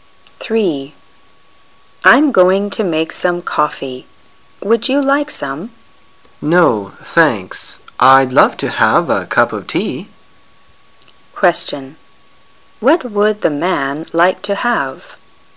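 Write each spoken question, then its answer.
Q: What would the man like to have?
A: A cup of tea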